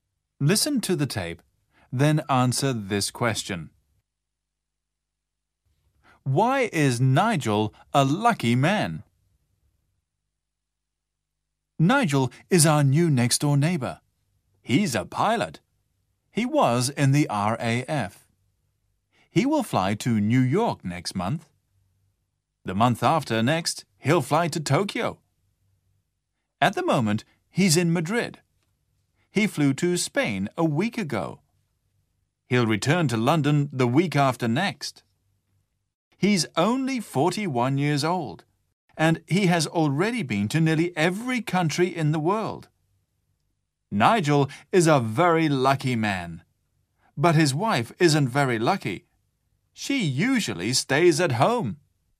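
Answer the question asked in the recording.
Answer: He's a pilot and has already been to nearly every country in the world.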